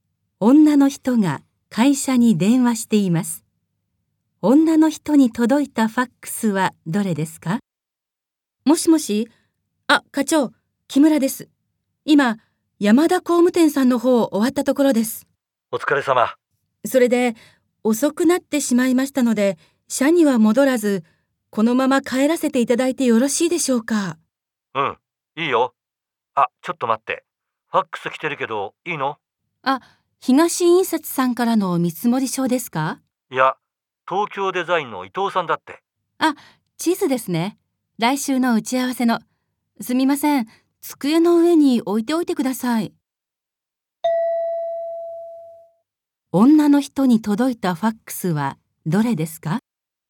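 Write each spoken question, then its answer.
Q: 女の人に届いたファックスはどれですか?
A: 東京デザインの伊藤さんからの地図(来週の打ち合わせの)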